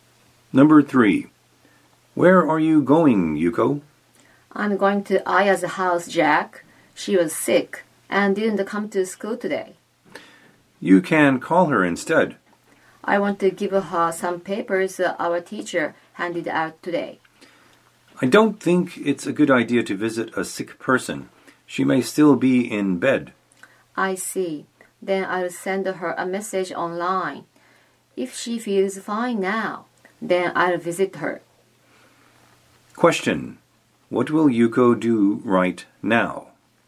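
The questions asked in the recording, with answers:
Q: What will Yuko do right now?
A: Send Aya a message online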